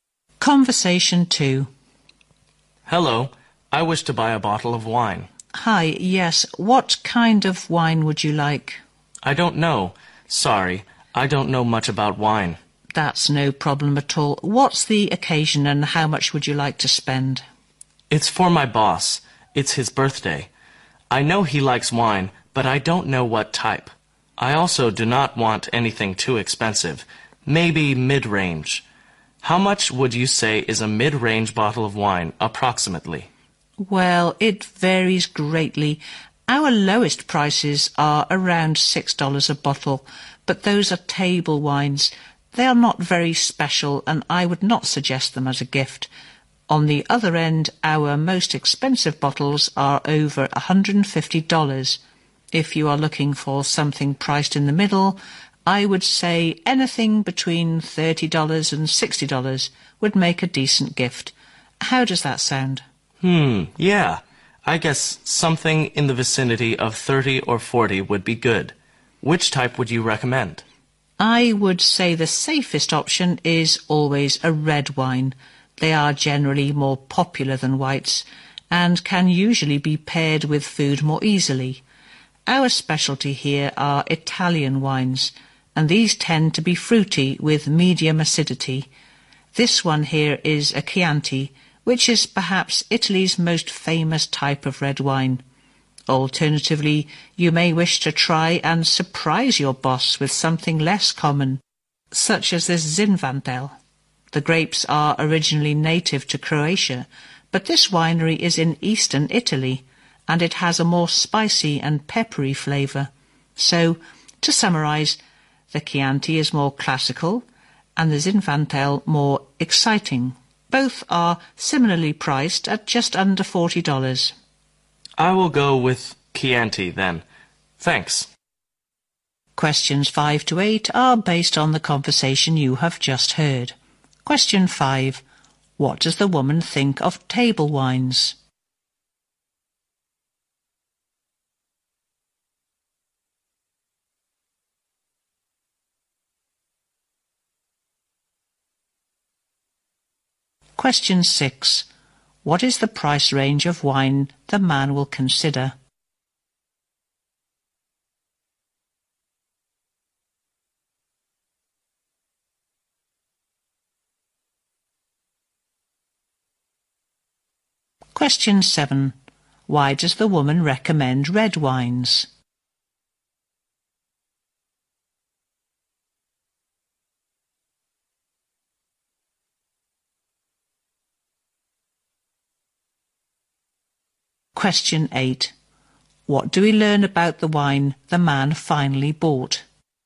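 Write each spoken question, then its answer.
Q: What does the woman think of table wines?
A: They are not special enough to give as a gift

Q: What is the price range of wine the man will consider?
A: About $30 to $40

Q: Why does the woman recommend red wines?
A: They are more popular and go with food more easily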